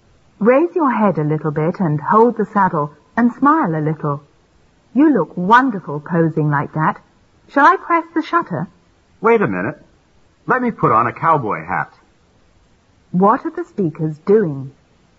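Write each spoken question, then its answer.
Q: What are the speakers doing?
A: Taking a photo (the man posing on a horse)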